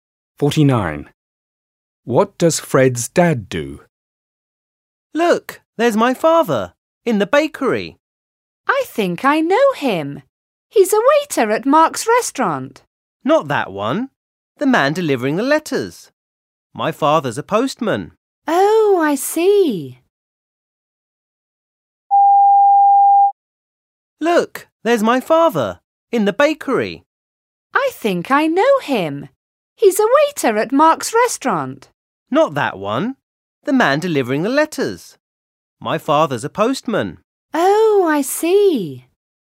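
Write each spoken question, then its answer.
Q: What does Fred's dad do?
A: He's a postman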